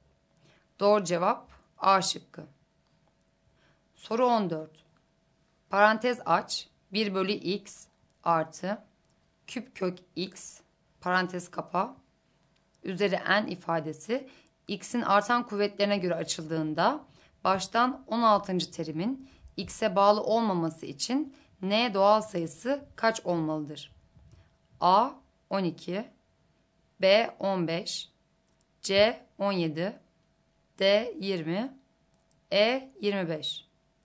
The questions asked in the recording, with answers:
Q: terimin x'e bağlı olmaması için n doğal sayısı kaç olmalıdır?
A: Doğru cevap D şıkkı.